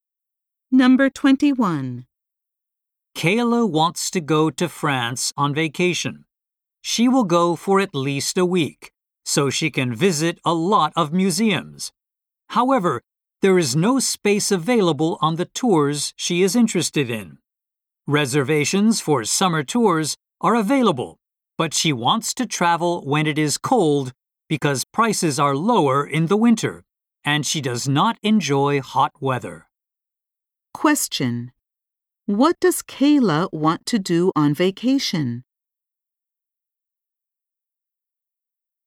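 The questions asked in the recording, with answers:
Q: What does Kayla want to do on vacation?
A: Visit a lot of museums in France.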